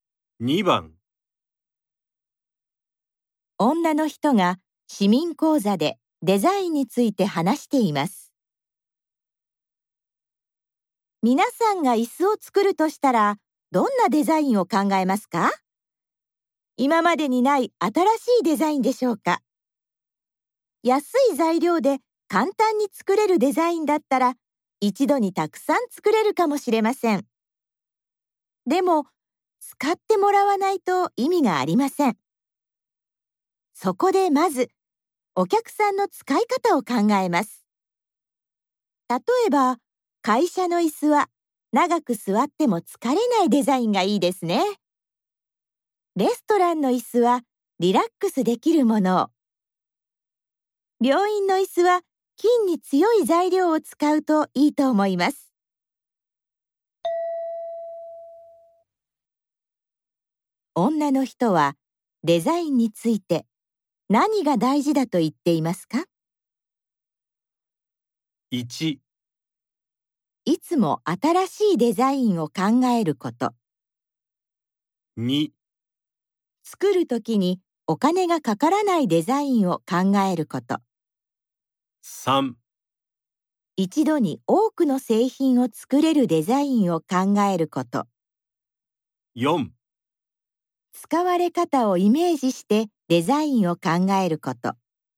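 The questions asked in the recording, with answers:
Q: 女の人はデザインについて何が大事だと言っていますか?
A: 4: 使われ方をイメージしてデザインを考えること。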